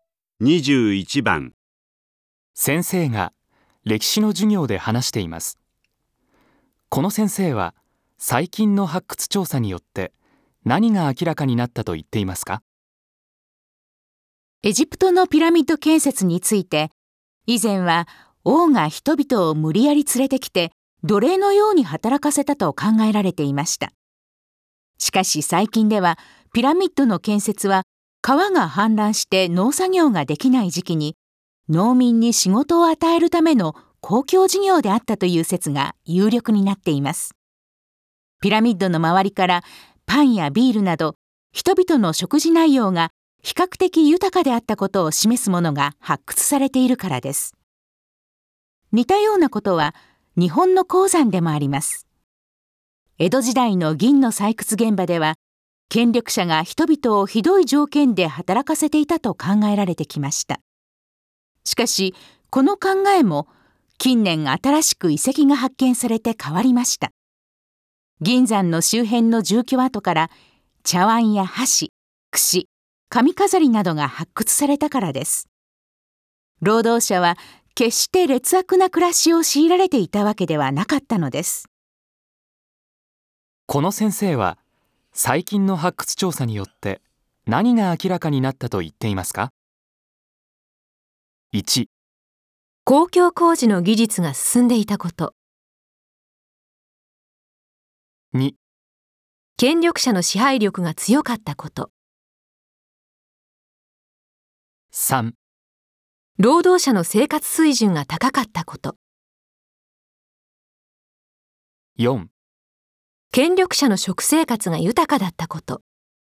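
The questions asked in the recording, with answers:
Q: この先生は最近の発掘調査によって何が明らかになったと言っていますか?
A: 3: 労働者の生活水準が高かったこと。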